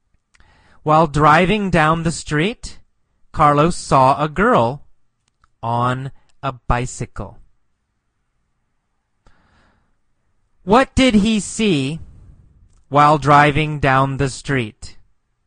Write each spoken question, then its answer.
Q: What did he see while driving down the street?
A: He saw a girl on a bicycle while driving down the street.